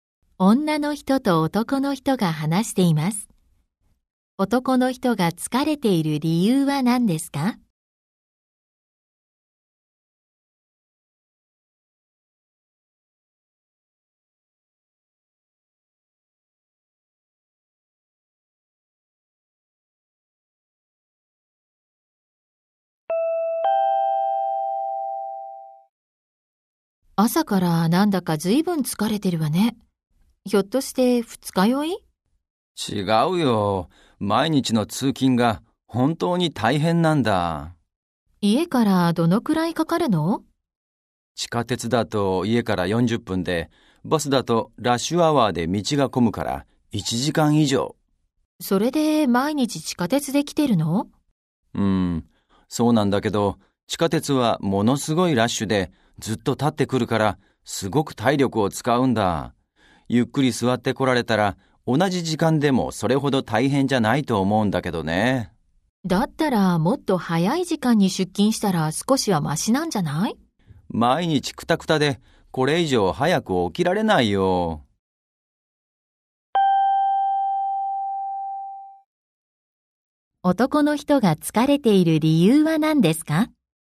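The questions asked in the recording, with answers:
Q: 男の人が疲れている理由は何ですか?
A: 地下鉄がすごく混んでいて、ずっと立って通勤しているから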